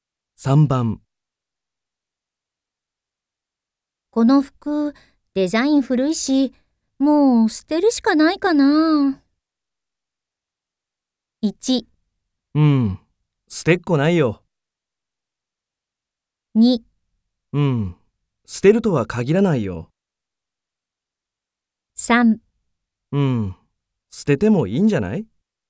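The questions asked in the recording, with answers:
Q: この服、デザイン古いし、もう捨てるしかないかな。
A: 3: うん、捨ててもいいんじゃない?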